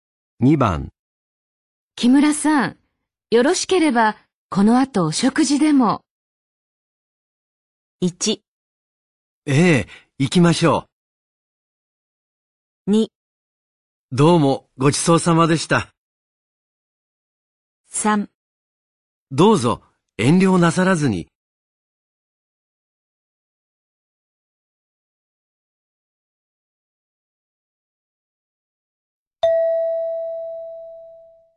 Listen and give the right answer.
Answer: 1

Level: N3 Listening · Test 9